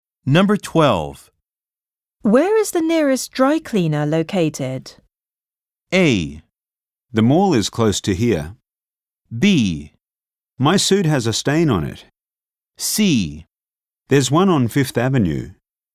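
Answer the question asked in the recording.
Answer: C: There's one on Fifth Avenue.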